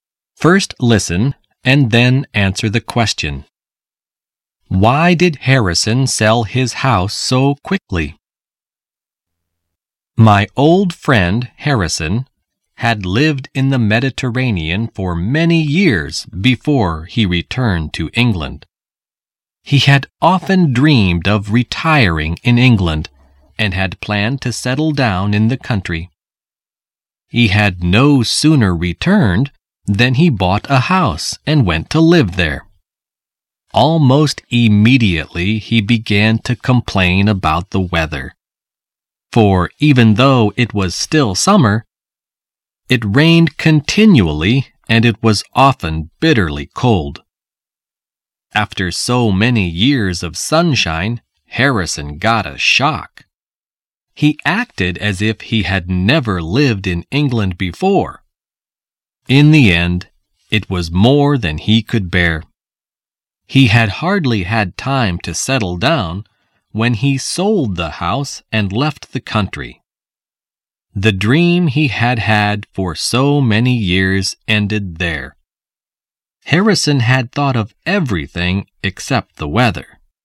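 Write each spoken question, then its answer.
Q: Why did Harrison sell his house so quickly?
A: Because he couldn't bear the English weather: it rained continually and was often bitterly cold.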